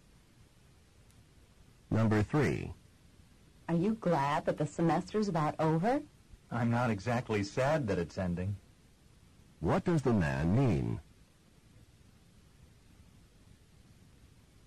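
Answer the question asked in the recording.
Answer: He is glad the semester is ending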